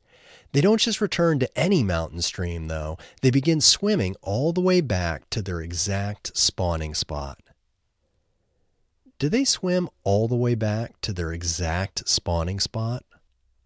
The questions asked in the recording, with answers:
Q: Do they swim all the way back to their exact spawning spot?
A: Yes, they swim all the way back to their exact spawning spot.